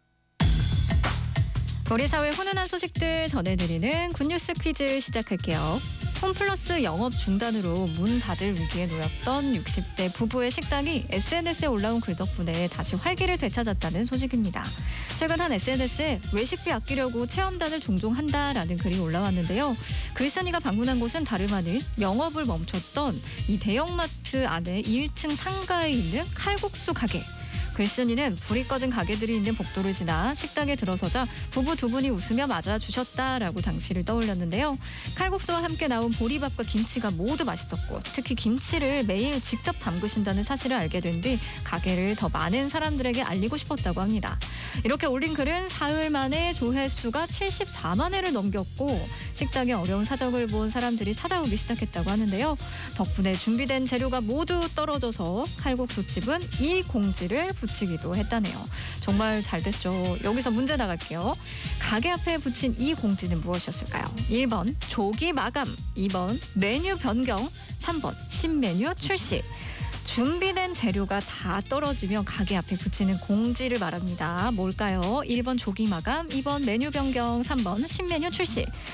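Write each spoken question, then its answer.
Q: 가게 앞에 붙인 이 공지는 무엇이었을까요?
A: 1: 조기 마감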